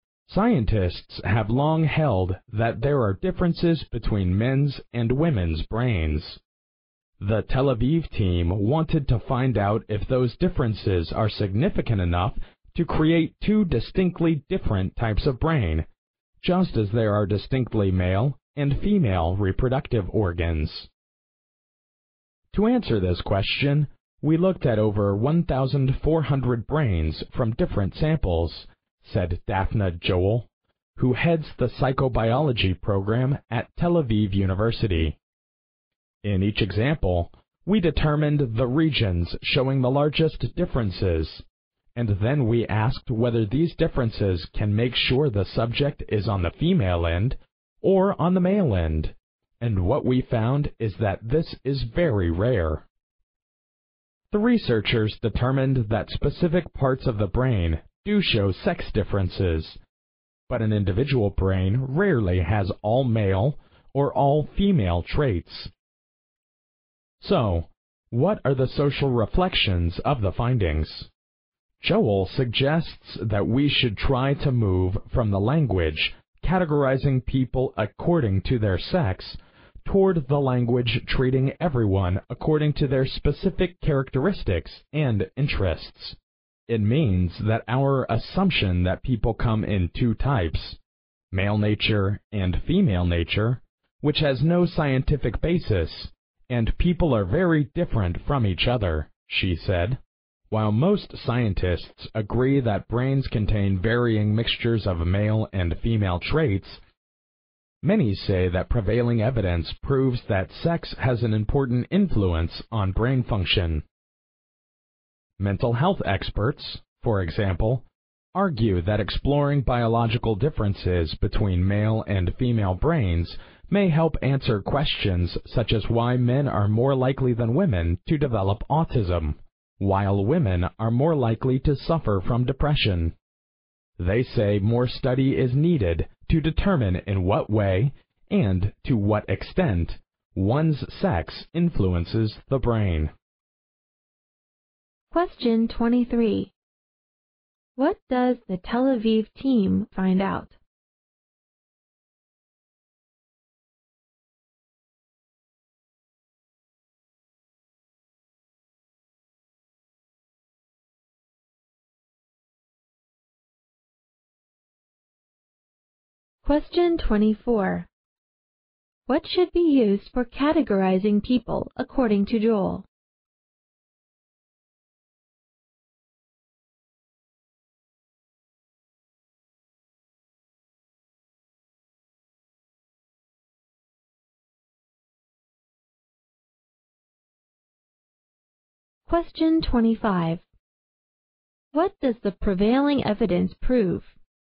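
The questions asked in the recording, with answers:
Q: What does the Tel Aviv team find out?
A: An individual brain rarely has all male or all female traits.

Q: What should be used for categorizing people according to Joel?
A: Their specific characteristics and interests.

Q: What does the prevailing evidence prove?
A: Sex has an important influence on brain function.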